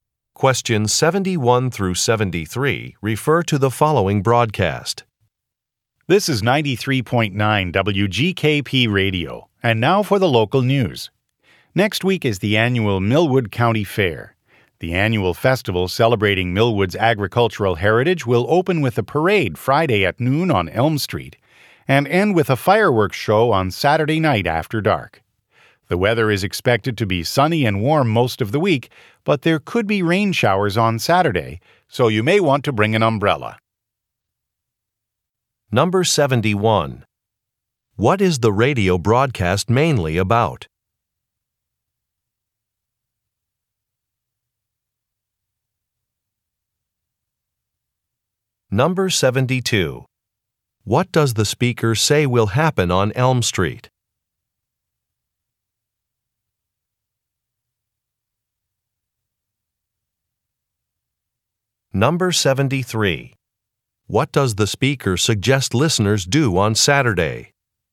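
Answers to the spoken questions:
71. The annual Millwood County Fair
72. A parade
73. Bring an umbrella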